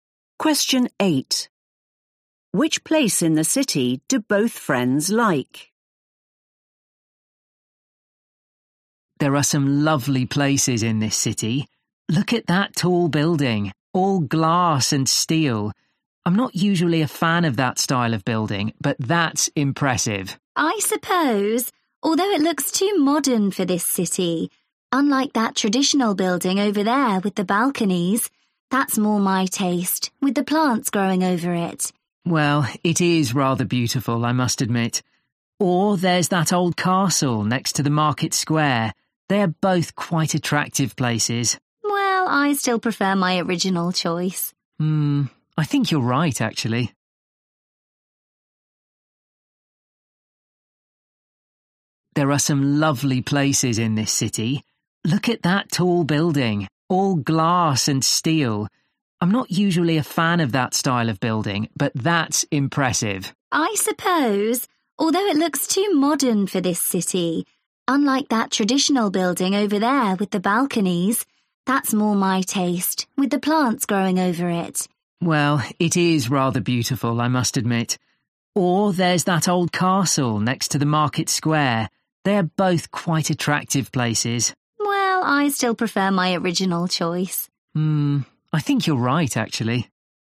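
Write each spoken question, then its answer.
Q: Which place in the city do both friends like?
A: the traditional building with balconies and plants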